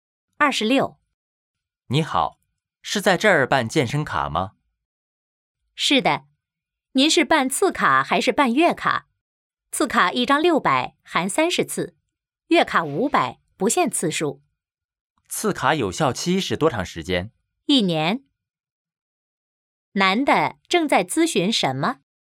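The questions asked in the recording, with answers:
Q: 男的正在咨询什么?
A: 办健身卡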